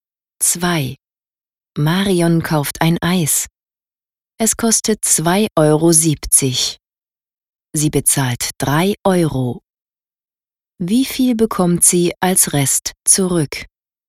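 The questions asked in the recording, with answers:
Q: Wie viel bekommt sie als Rest zurück?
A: 30 Cent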